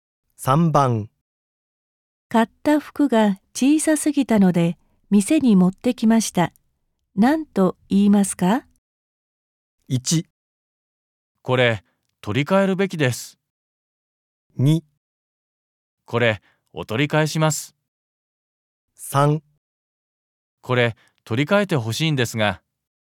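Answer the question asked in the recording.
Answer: 3: これ取り替えてほしいんですが。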